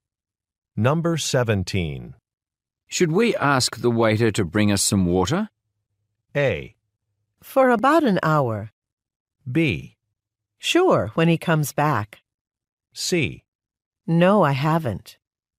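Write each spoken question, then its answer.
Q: Should we ask the waiter to bring us some water?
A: B: Sure, when he comes back.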